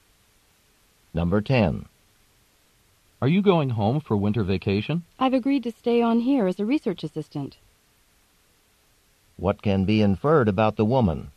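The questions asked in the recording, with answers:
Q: What can be inferred about the woman?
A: She will not go home for winter vacation; she will stay to work as a research assistant.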